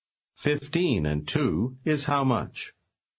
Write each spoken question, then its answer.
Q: 15 and 2 is how much?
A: 17.